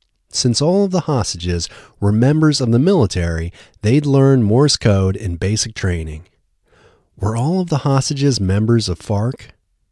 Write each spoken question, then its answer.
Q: Were all of the hostages members of FARC?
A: No, all of the hostages weren't members of FARC.